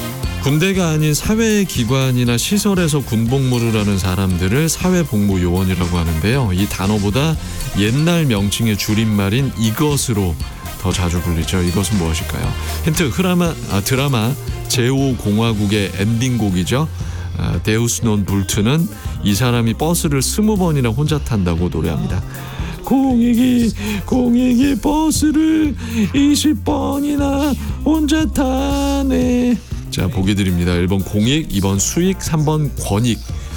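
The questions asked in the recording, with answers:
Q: 이것은 무엇일까요?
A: 1: 공익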